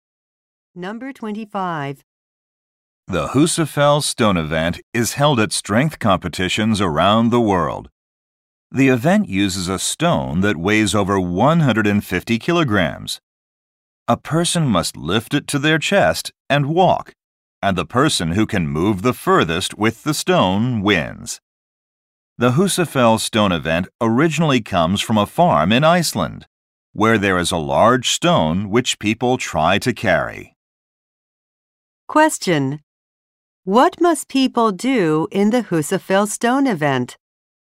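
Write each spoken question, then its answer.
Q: What must people do in the Husafell stone event?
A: Lift a heavy stone to their chest and walk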